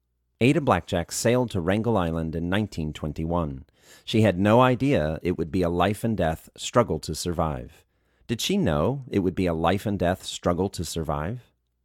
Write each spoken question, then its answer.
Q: Did she know it would be a life and death struggle to survive?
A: No, she had no idea it would be a life and death struggle to survive.